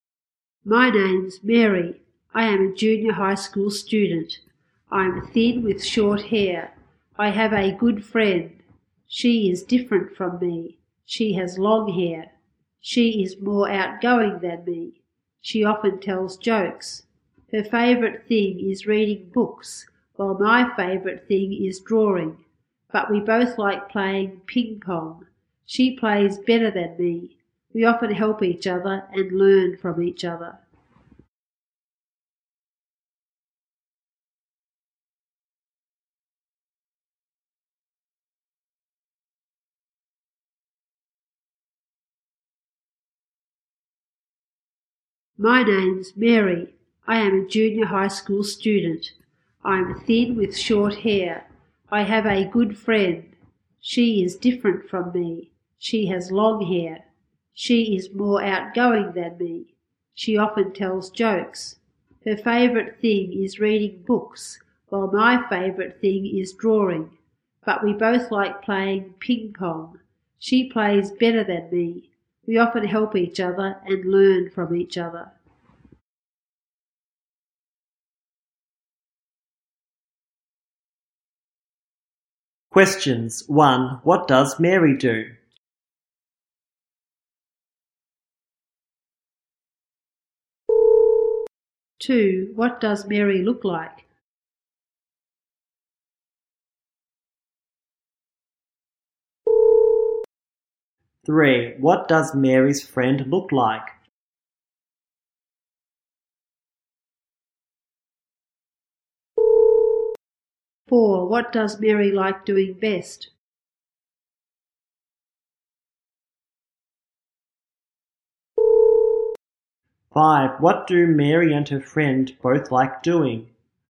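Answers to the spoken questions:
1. She is a junior high school student
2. Thin with short hair
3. She has long hair
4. Drawing
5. Playing ping pong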